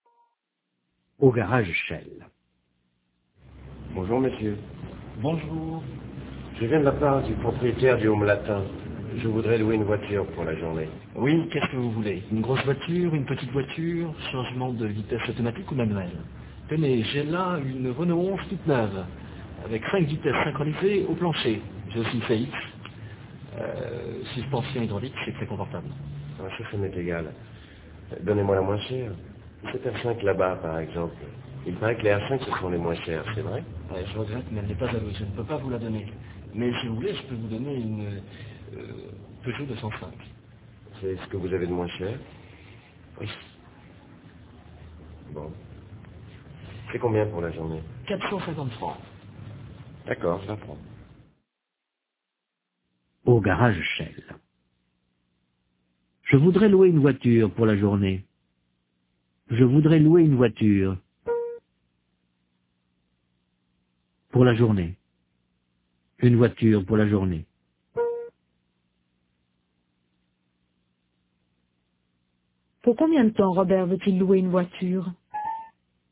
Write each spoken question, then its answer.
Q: Pour combien de temps Robert veut-il louer une voiture?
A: Pour la journée.